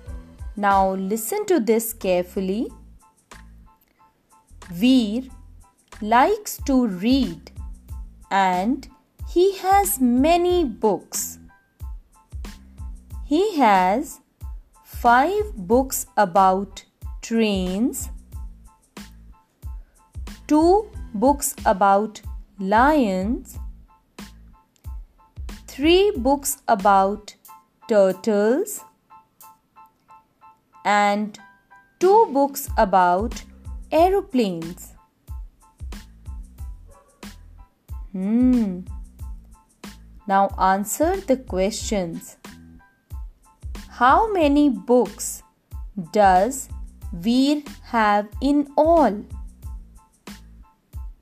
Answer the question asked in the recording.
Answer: 12 books.